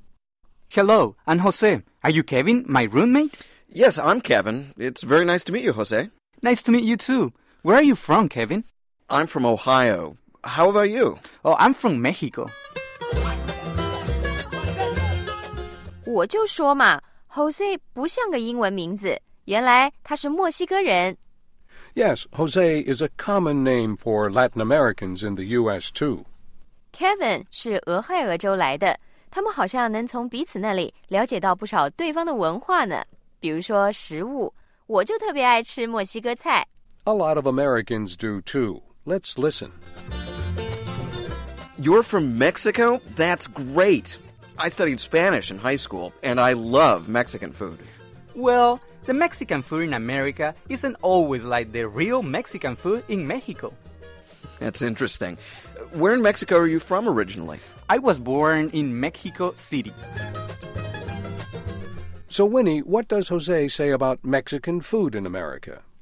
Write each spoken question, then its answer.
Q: So Winnie, what does Jose say about Mexican food in America?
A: 他说美国的墨西哥菜不是真正的墨西哥菜